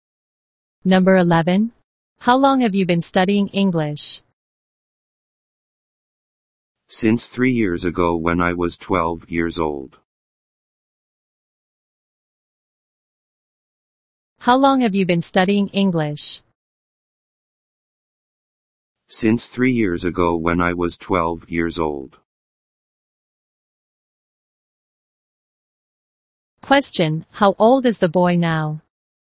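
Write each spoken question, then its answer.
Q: how old is the boy now?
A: 15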